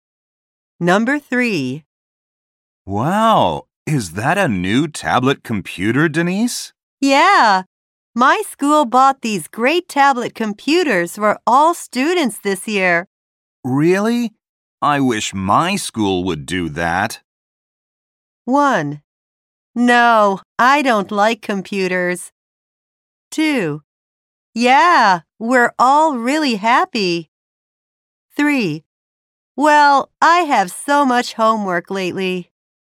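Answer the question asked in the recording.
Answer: 2: Yeah, we're all really happy.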